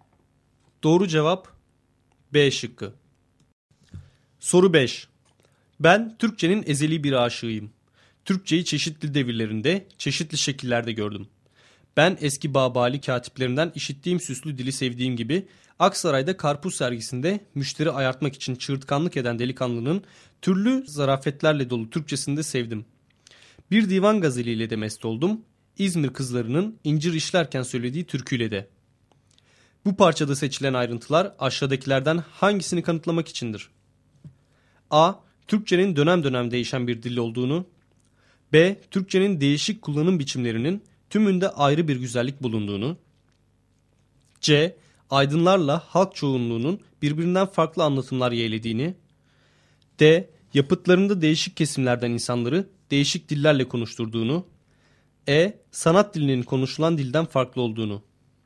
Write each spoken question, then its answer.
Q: Bu parçada seçilen ayrıntılar aşağıdakilerden hangisini kanıtlamak içindir?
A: Doğru cevap B şıkkı.